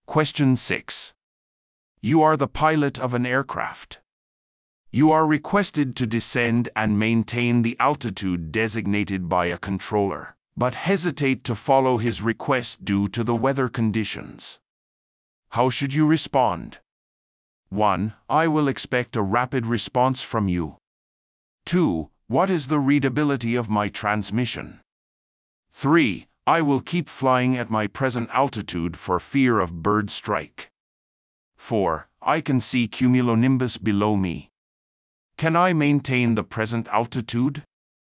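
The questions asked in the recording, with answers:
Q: How should you respond?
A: 4: I can see cumulonimbus below me. Can I maintain the present altitude?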